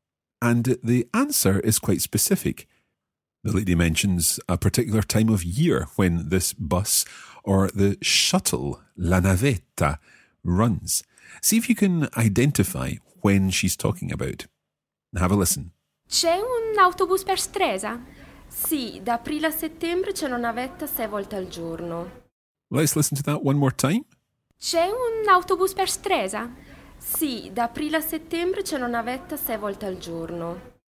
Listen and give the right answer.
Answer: da aprile a settembre, from April to September